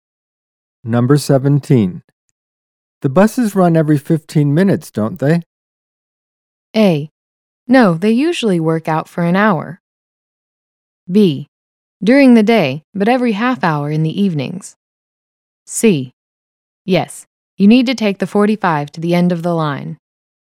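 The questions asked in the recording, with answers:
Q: The buses run every 15 minutes, don't they?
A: B: During the day, but every half hour in the evenings.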